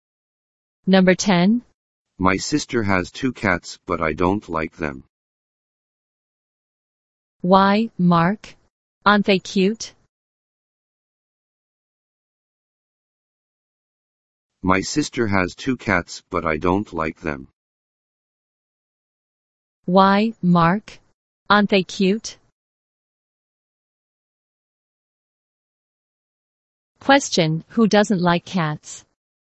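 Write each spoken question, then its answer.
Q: Question, who doesn't like cats?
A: Mark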